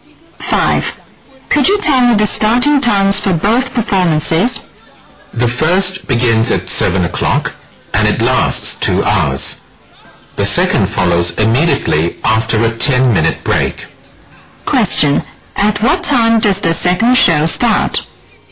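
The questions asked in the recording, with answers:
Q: At what time does the second show start?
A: 9:10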